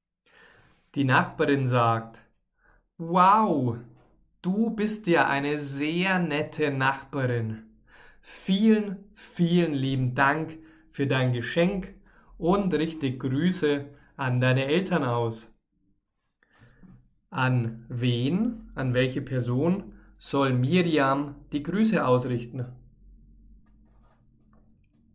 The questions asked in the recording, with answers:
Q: An wen, an welche Person soll Miriam die Grüße ausrichten?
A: an Miriams Eltern.